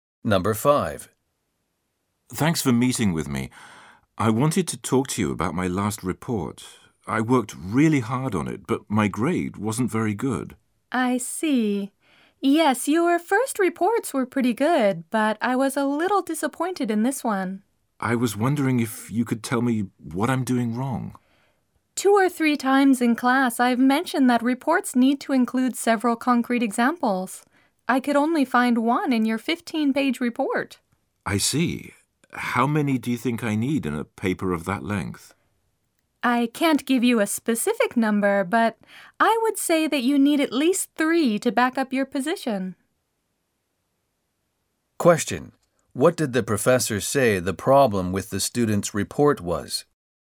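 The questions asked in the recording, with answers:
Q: What did the professor say the problem with the student's report was?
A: It had too few concrete examples (only one; it needed at least 3).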